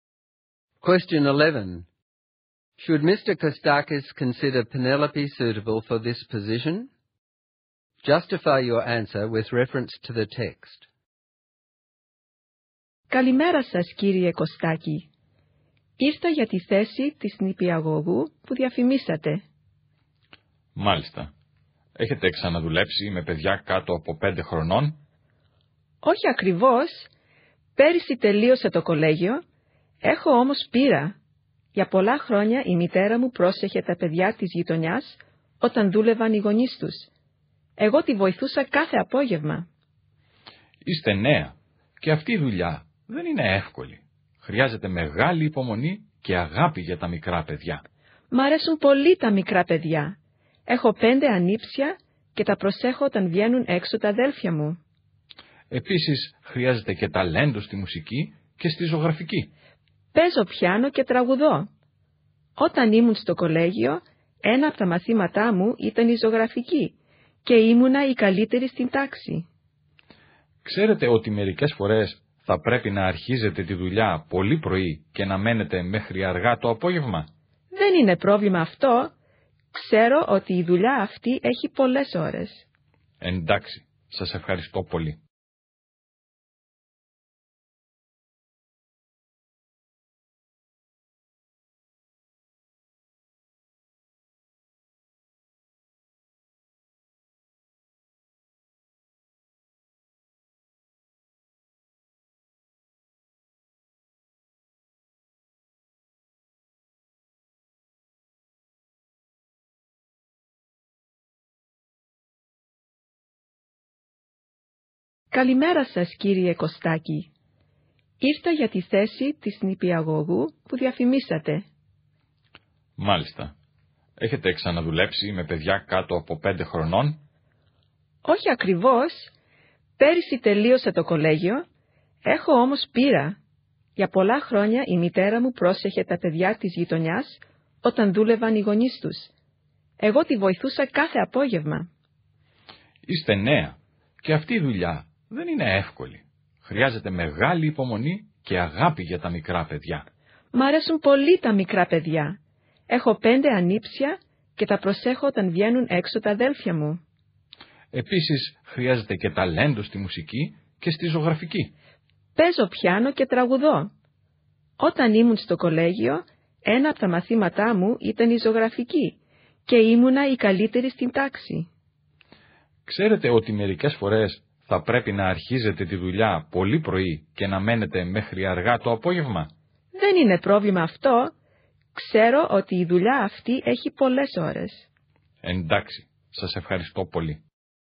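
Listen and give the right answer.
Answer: Yes: she has experience helping her mother mind children and looks after her 5 nephews and nieces, she loves small children, she plays piano, sings and was the best in her painting class, and she accepts the long hours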